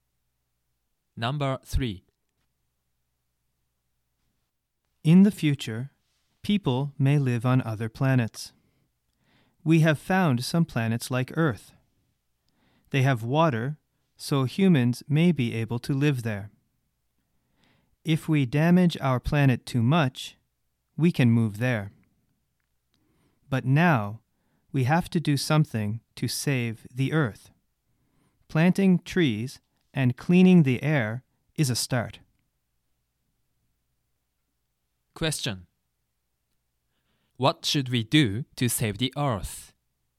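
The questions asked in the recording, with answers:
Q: What should we do to save the Earth?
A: Plant trees and clean the air.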